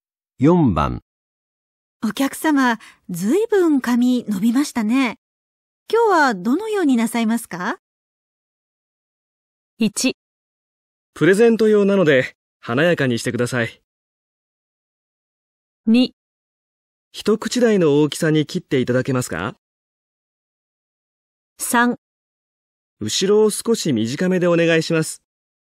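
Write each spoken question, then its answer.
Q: お客様、ずいぶん髪伸びましたね。今日はどのようになさいますか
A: 3: 後ろを少し短めでお願いします。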